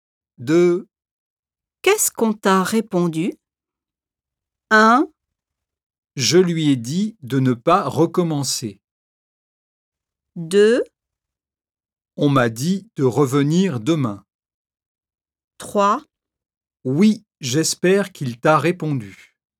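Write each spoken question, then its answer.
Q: Qu'est-ce qu'on t'a répondu?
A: 2: On m'a dit de revenir demain.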